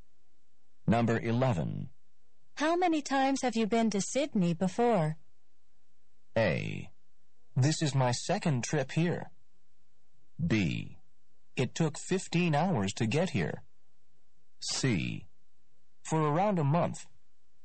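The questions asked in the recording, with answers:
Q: How many times have you been to Sydney before?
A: A: This is my second trip here.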